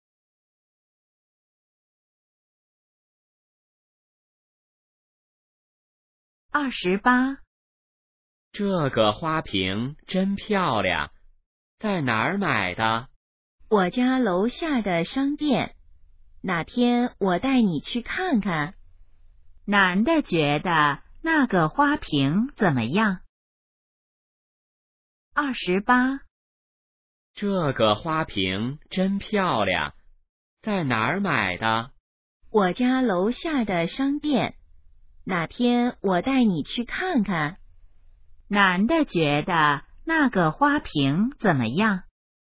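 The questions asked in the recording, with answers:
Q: 男的觉得那个花瓶怎么样?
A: 很漂亮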